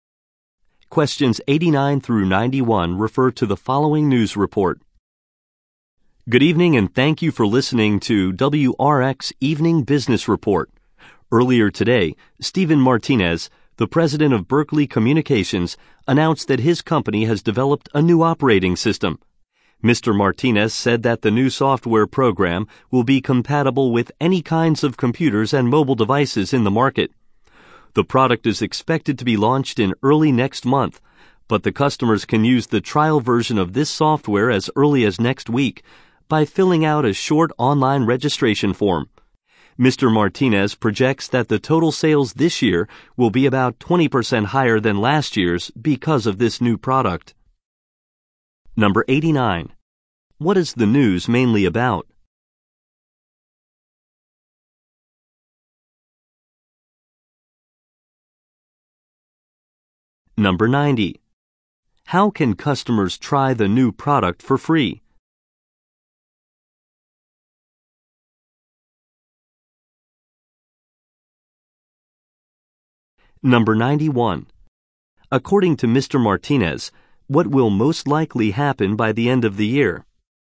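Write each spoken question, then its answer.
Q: What is the news mainly about?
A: A new operating system developed by Berkeley Communications

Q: How can customers try the new product for free?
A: By filling out a short online registration form

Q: Martinez, what will most likely happen by the end of the year?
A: Sales will be about 20% higher than last year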